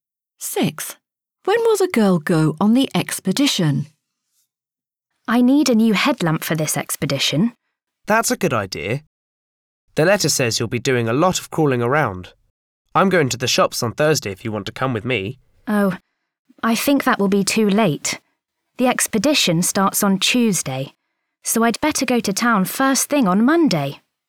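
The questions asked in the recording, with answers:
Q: When will the girl go on the expedition?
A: On Tuesday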